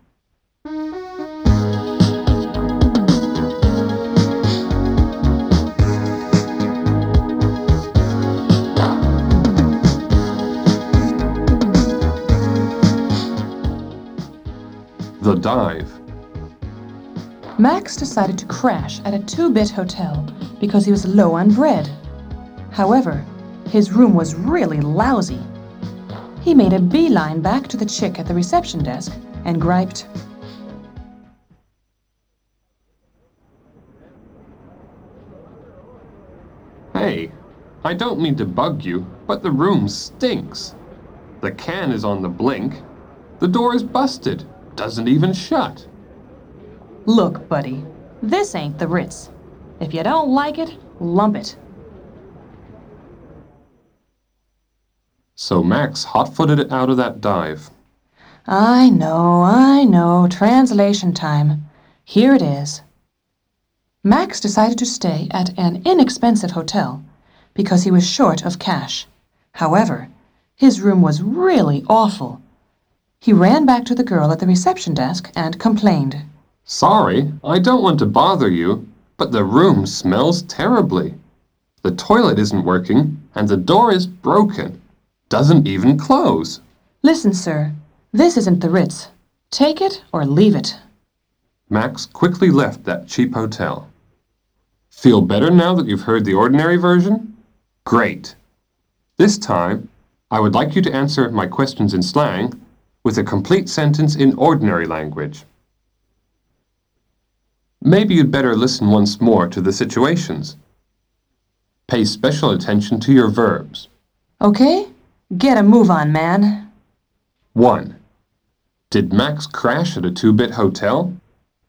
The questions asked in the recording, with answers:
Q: Did Max crash at a two-bit hotel?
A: Yes, he stayed at an inexpensive hotel.